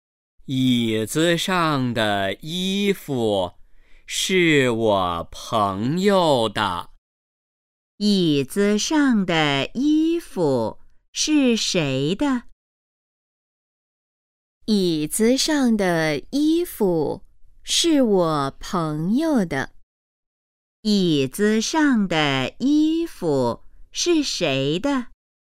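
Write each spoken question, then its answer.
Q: 椅子上的衣服是谁的?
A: 他朋友的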